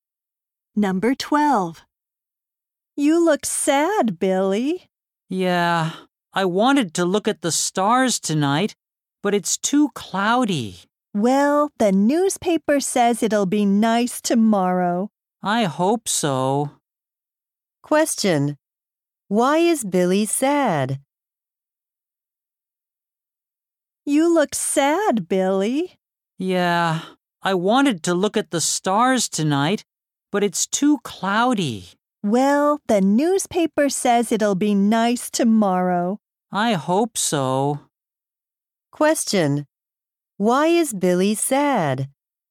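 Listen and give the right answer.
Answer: It's too cloudy to look at the stars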